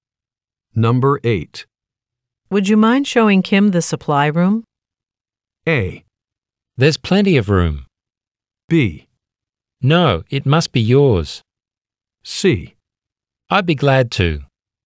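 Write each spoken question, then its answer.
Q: Would you mind showing Kim the supply room?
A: C: I'd be glad to.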